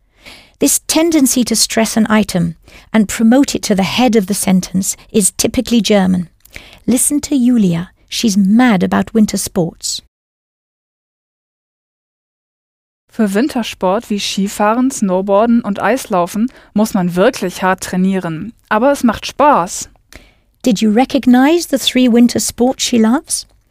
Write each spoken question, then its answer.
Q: Did you recognize the three winter sports she loves?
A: Winter sports like, wie, skiing, snowboarding and ice skating.